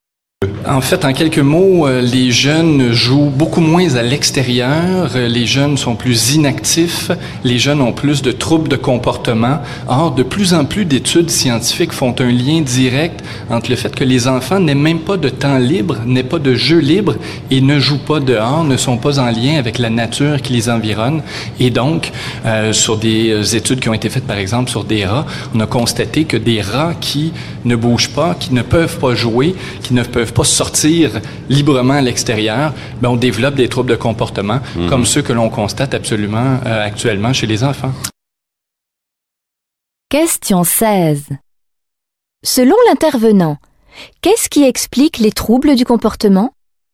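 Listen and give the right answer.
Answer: Le manque de temps et de jeu libre à l'extérieur, sans lien avec la nature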